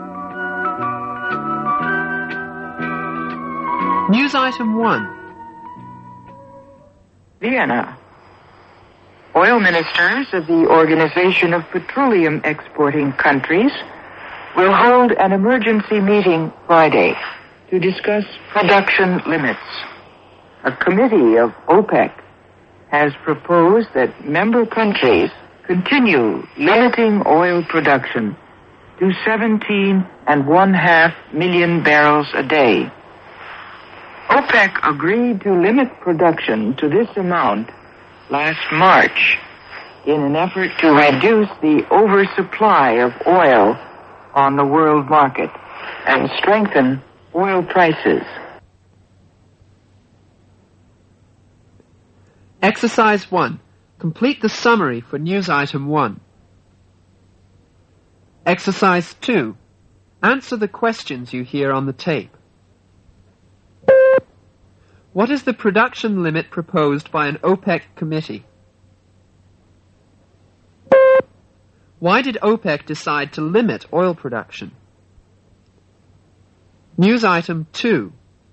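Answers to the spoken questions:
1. 17.5 million barrels of oil a day
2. To reduce the oversupply of oil on the world market and strengthen oil prices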